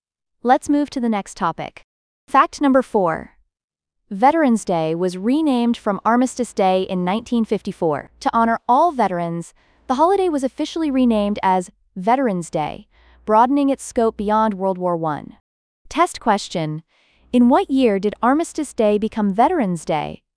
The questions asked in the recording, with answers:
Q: In what year did Armistice Day become Veterans Day?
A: 1954.